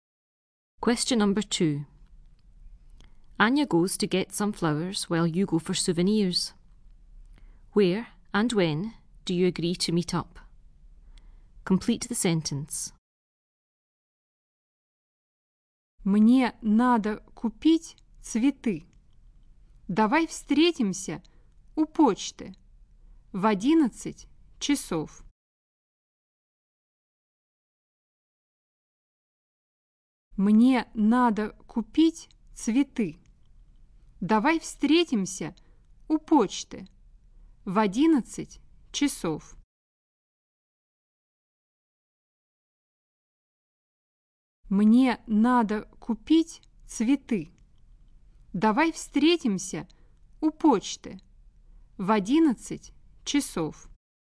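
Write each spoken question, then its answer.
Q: Where and when do you agree to meet up?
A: At the post office at 11 o'clock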